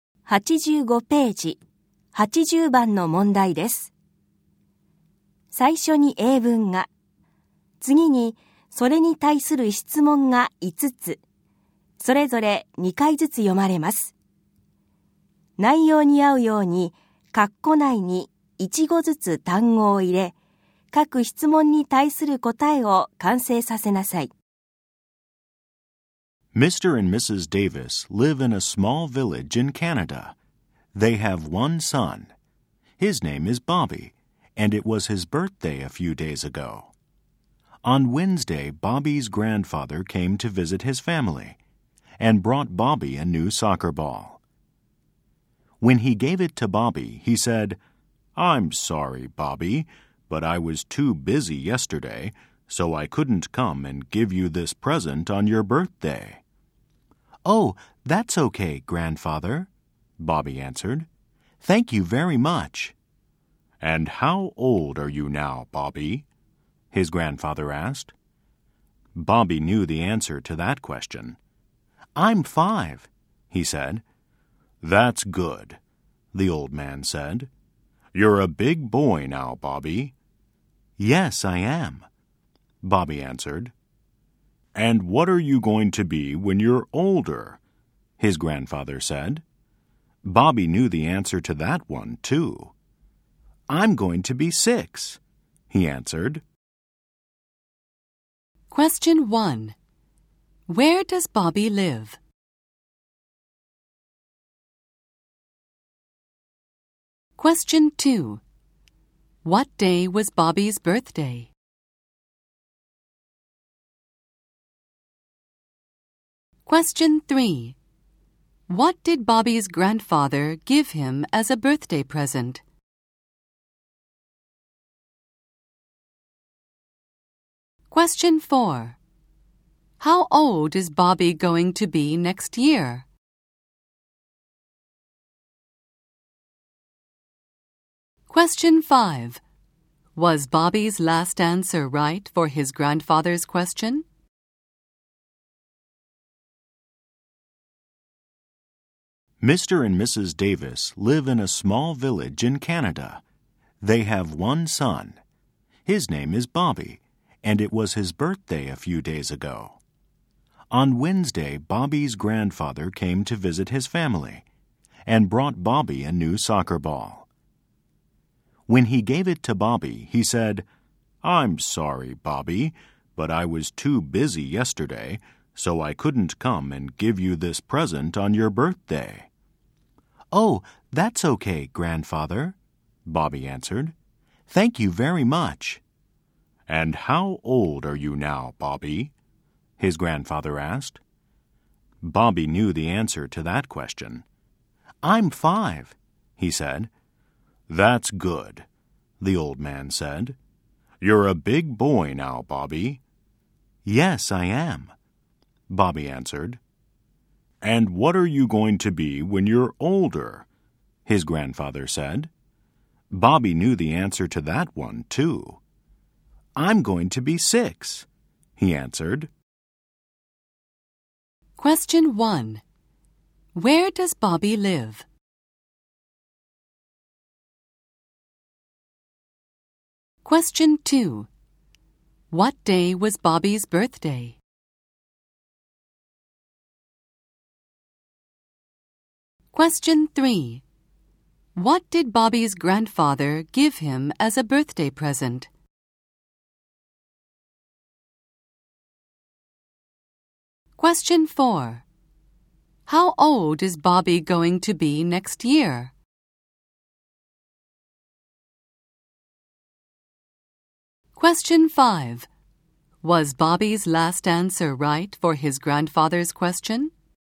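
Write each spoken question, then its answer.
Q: Where does Bobby live?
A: In a small village in Canada

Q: What day was Bobby's birthday?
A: Tuesday

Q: What did Bobby's grandfather give him as a birthday present?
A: A new soccer ball

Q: How old is Bobby going to be next year?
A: Six

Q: Was Bobby's last answer right for his grandfather's question?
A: No, it wasn't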